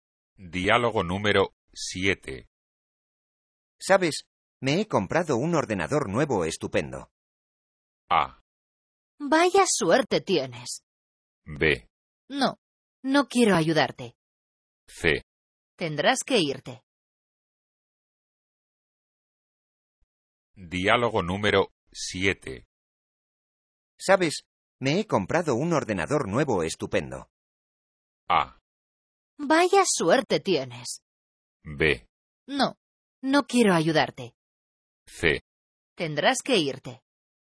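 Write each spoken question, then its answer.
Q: ¿Sabes? Me he comprado un ordenador nuevo estupendo.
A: A: Vaya suerte tienes.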